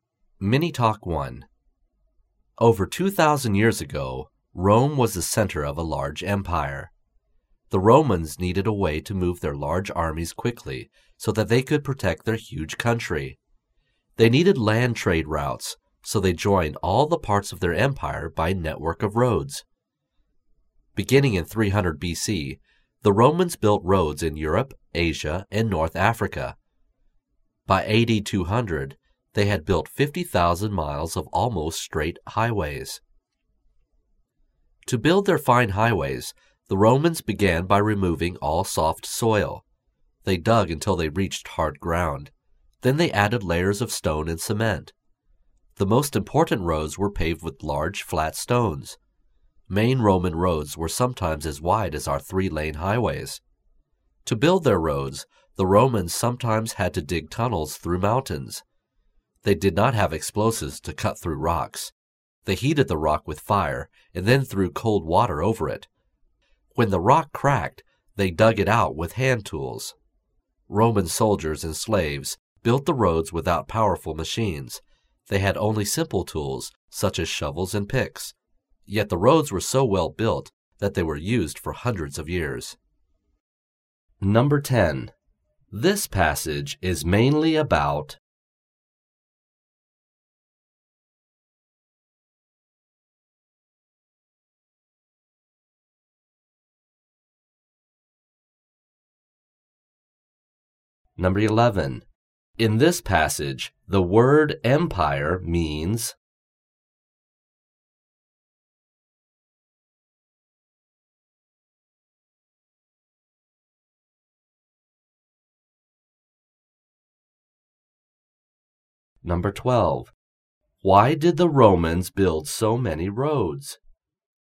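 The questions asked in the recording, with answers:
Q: This passage is mainly about...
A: How the Romans built their roads

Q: Why did the Romans build so many roads?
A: To move their armies quickly to protect the empire, and for land trade routes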